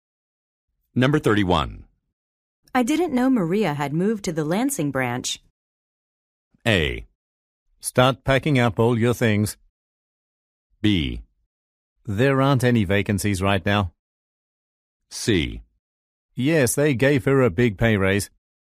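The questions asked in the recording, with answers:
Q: I didn't know Maria had moved to the Lansing branch.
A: C: Yes, they gave her a big pay raise.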